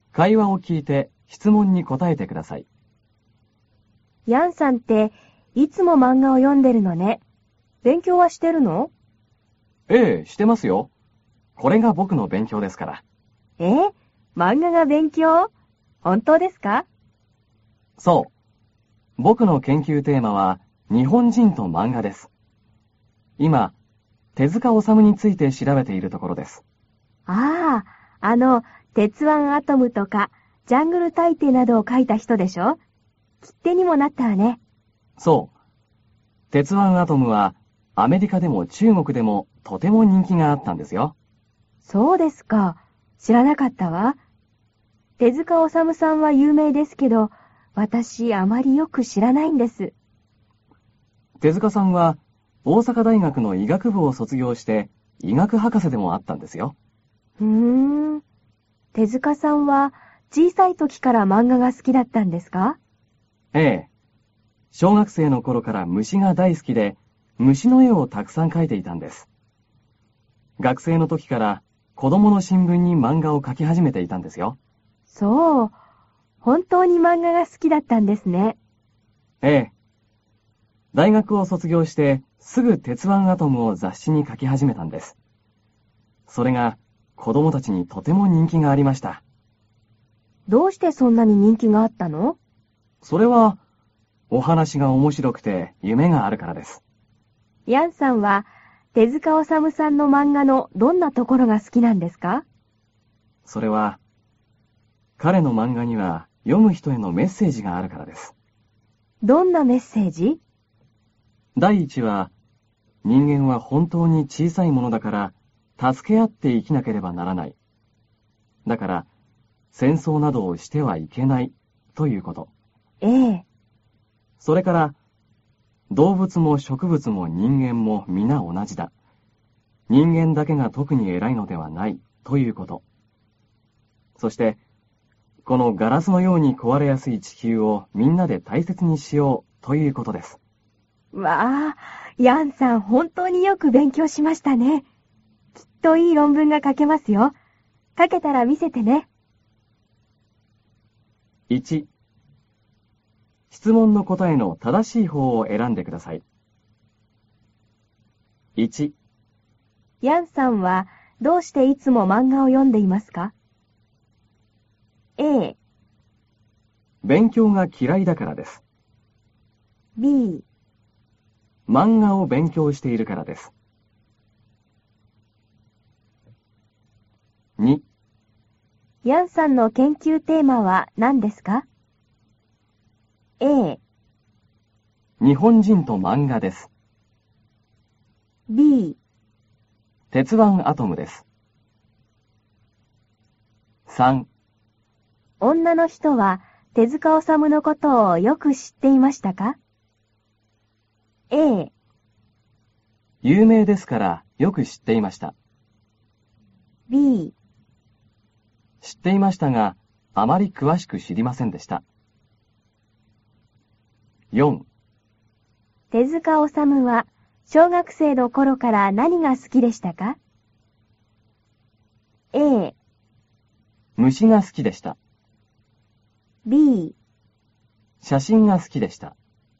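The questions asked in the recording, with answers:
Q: ヤンさんはどうしていつも漫画を読んでいますか?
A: B: 漫画を勉強しているからです。

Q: ヤンさんの研究テーマは何ですか?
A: A: 日本人と漫画です。

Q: 女の人は手塚治虫のことをよく知っていましたか?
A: B: 知っていましたが、あまり詳しく知りませんでした。

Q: 手塚治虫は小学生の頃から何が好きでしたか?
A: A: 虫が好きでした。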